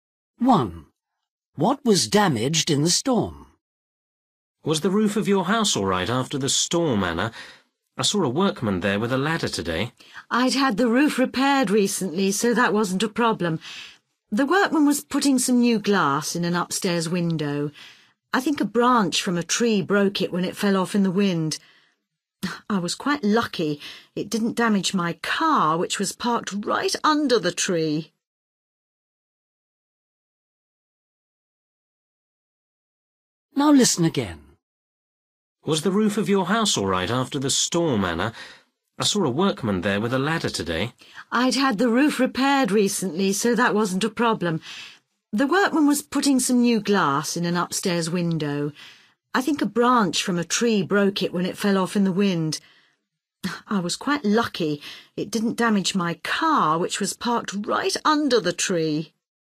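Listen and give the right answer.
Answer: An upstairs window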